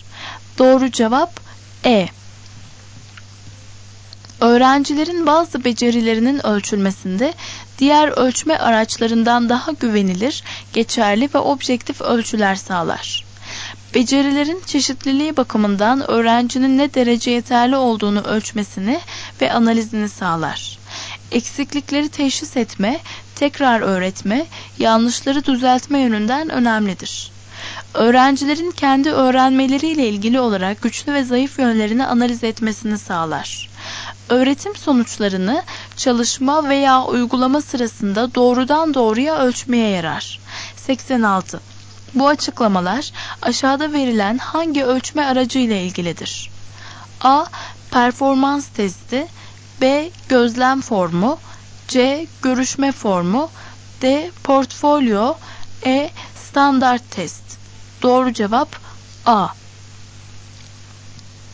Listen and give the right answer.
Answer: Doğru cevap A.